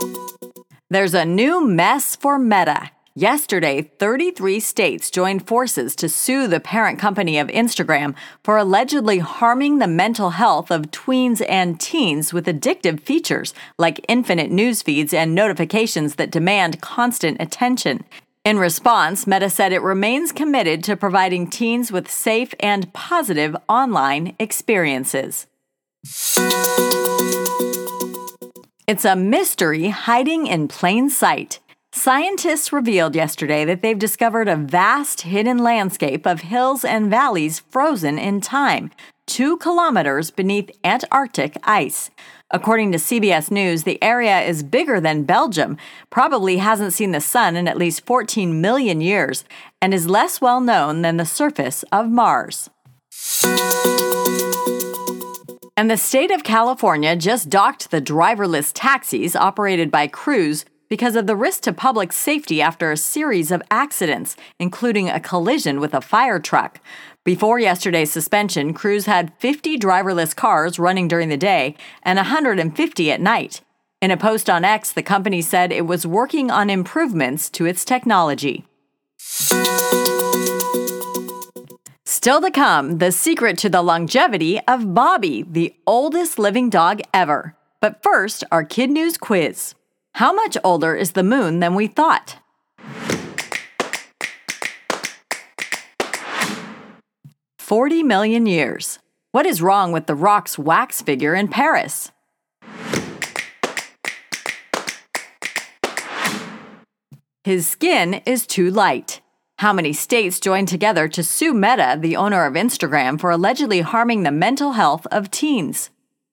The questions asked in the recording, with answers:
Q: How many states joined together to sue Meta, the owner of Instagram, for allegedly harming the mental health of teens?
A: Number 33.